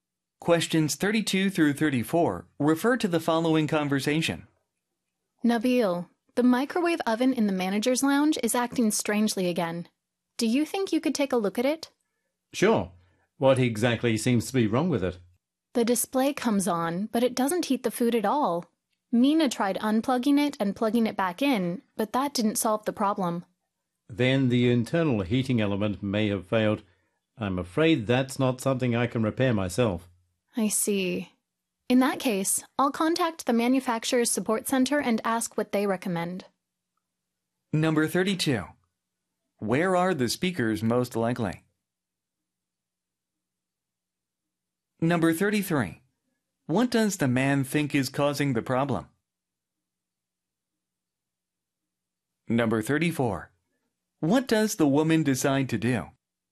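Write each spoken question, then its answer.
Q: What does the man think is causing the problem?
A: The internal heating element may have failed

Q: What does the woman decide to do?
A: Contact the manufacturer's support center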